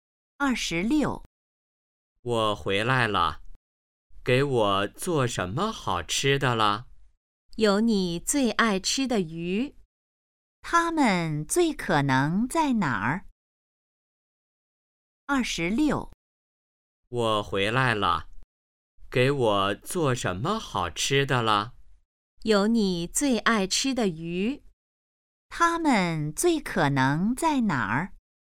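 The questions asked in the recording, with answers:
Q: 他们最可能在哪儿?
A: 家里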